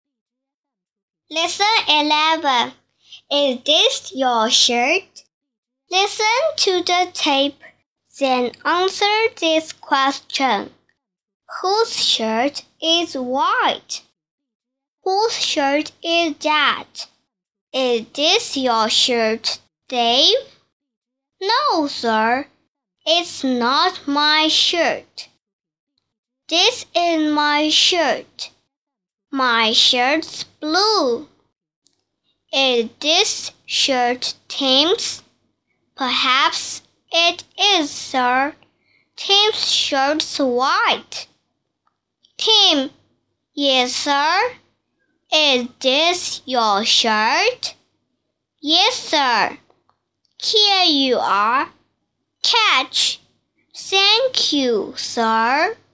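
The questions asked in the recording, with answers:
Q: Whose shirt is white?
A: Tim's shirt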